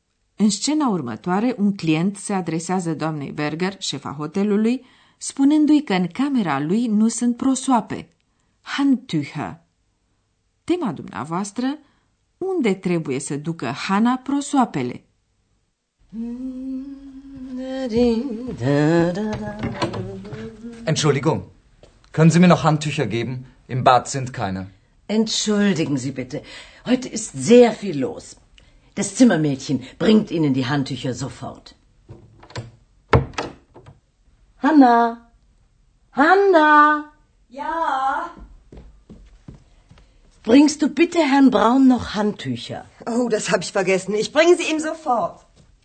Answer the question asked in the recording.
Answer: Camerista trebuie să ducă numai decât prosoape domnului Brown, deoarece a uitat să pună prosoape curate în camera sa de baie.